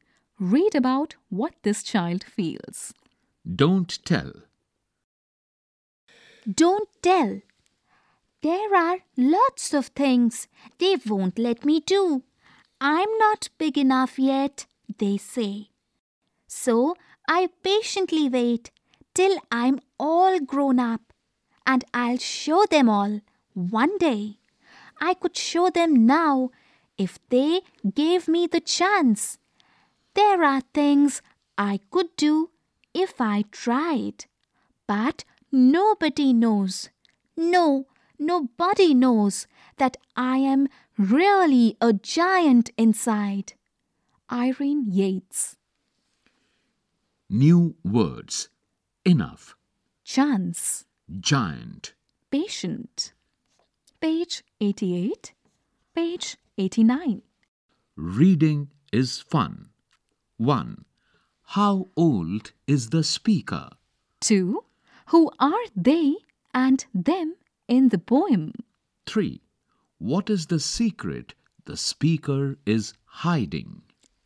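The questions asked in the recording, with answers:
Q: Who are they and them in the poem?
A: The grown-ups

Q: What is the secret the speaker is hiding?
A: That the speaker is really a giant inside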